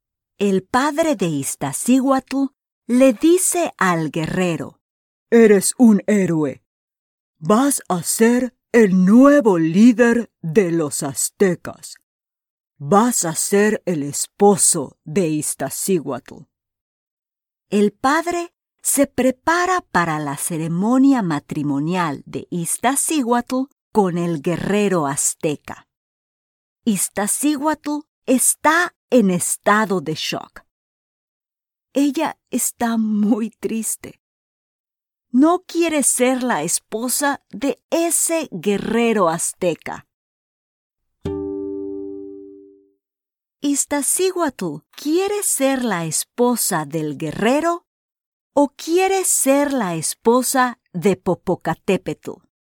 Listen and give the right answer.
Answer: Sí, tienes razón. Iztaccíhuatl no quiere ser la esposa del guerrero.